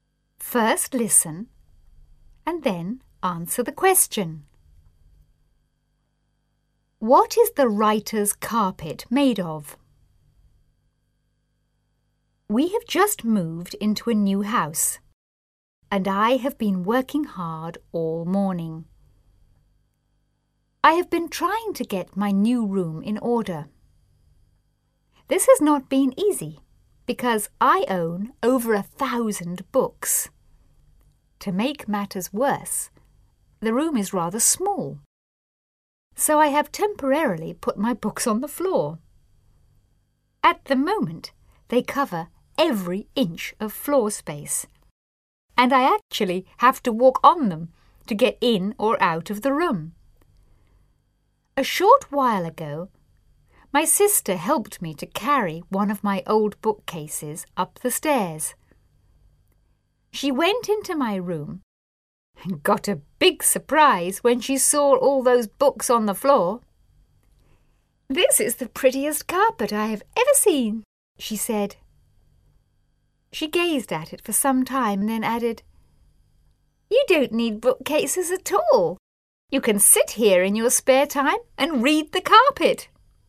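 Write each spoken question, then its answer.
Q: What is the writer's carpet made of?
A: Books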